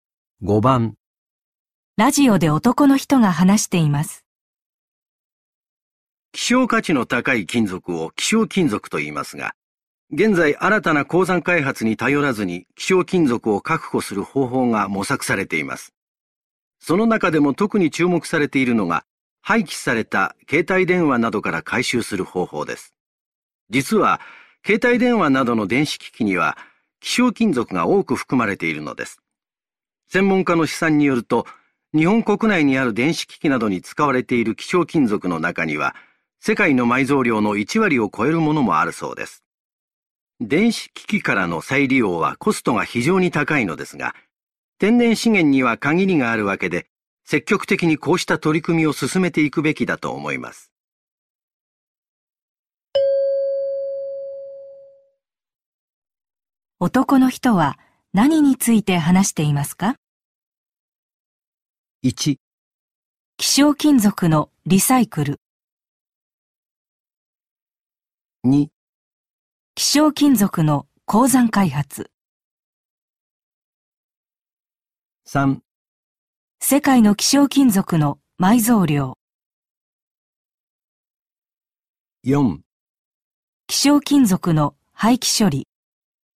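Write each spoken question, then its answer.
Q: 男の人は何について話していますか?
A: 1: 希少金属のリサイクル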